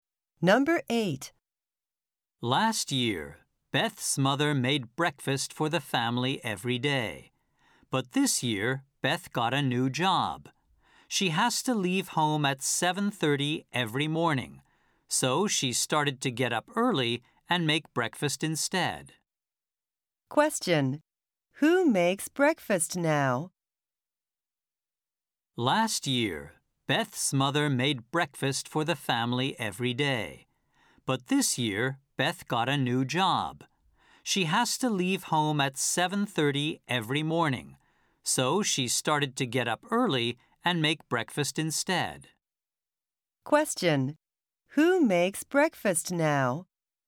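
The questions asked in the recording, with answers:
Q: Who makes breakfast now?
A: Beth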